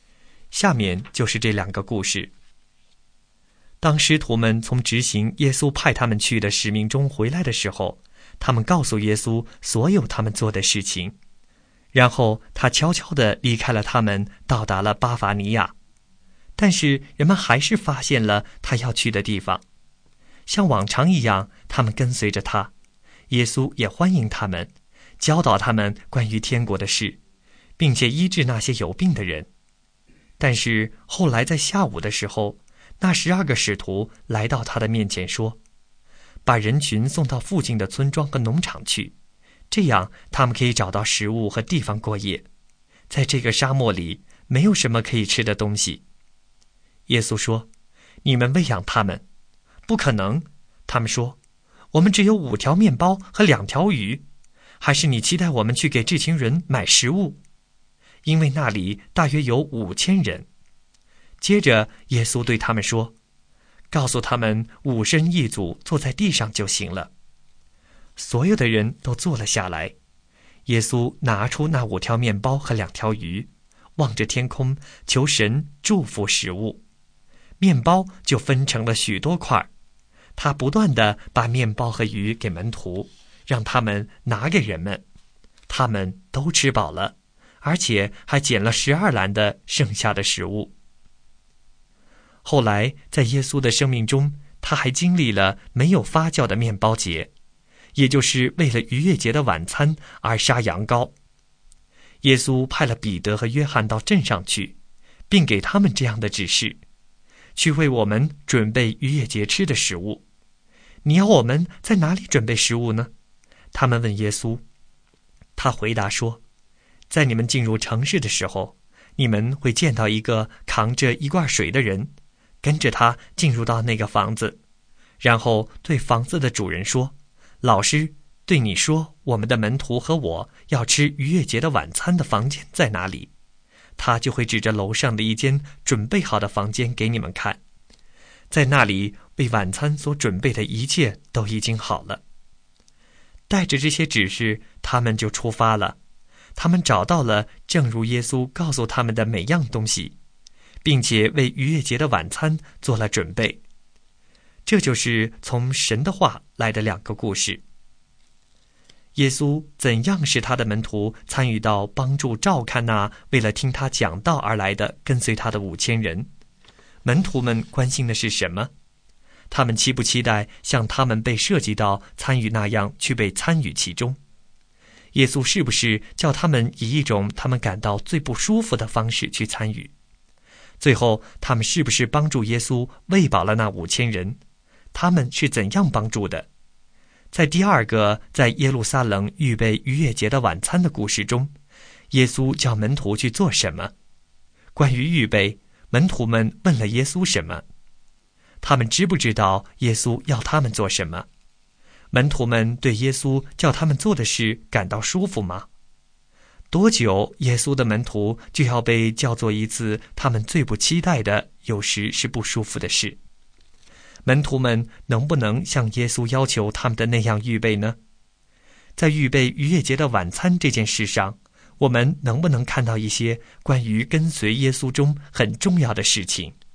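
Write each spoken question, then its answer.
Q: 最后,他们是不是帮助耶稣喂饱了那5000人?他们是怎样帮助的?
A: 是的,他们让人们坐下,把耶稣给的面包和鱼分给人们

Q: 在第二个在耶路撒冷预备逾越节的晚餐的故事中,耶稣叫门徒去做什么?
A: 到城里去准备逾越节的晚餐

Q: 关于预备,门徒们问了耶稣什么?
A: 要在哪里准备食物

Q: 门徒们能不能像耶稣要求他们的那样预备呢?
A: 能,他们找到了耶稣说的一切并做了准备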